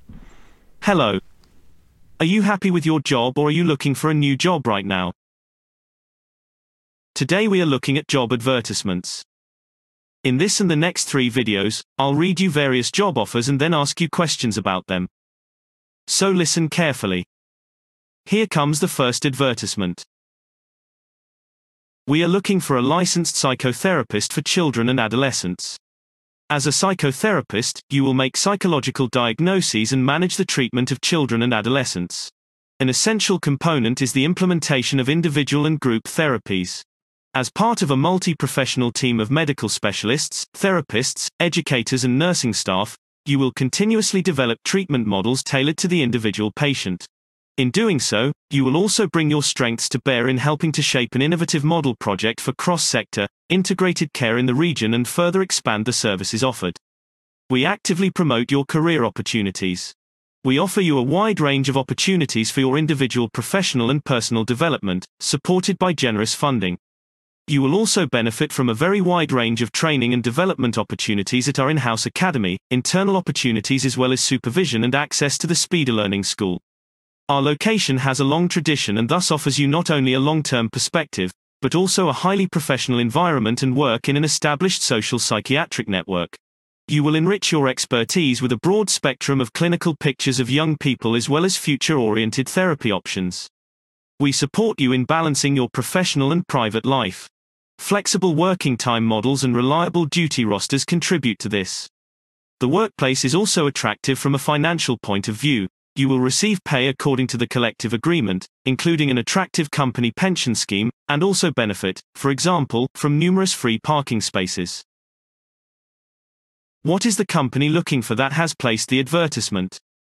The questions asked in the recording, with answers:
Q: What is the company looking for that has placed the advertisement?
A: They are looking for a licensed psychotherapist for children and adolescents.